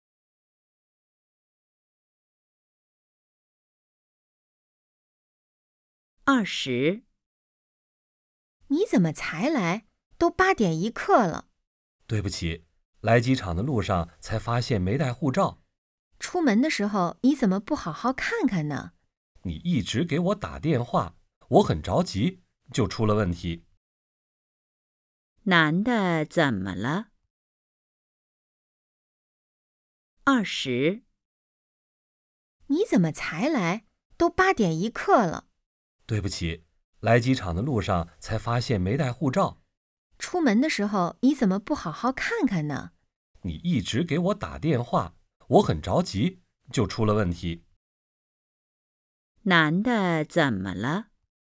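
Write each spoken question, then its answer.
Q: 男的怎么了?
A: 没带护照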